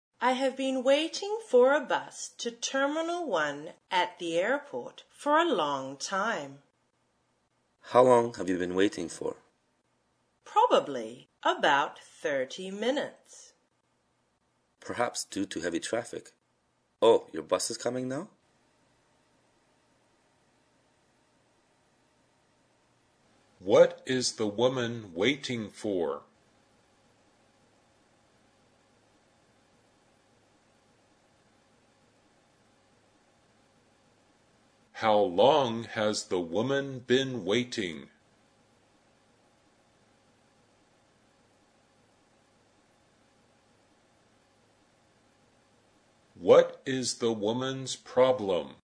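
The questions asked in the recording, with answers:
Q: What is the woman waiting for?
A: A bus to Terminal 1 at the airport

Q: How long has the woman been waiting?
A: About 30 minutes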